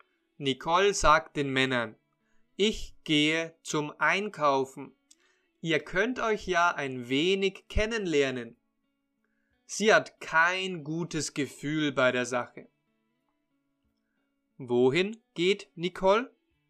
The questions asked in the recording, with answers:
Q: Wohin geht Nicole?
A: zum Einkaufen.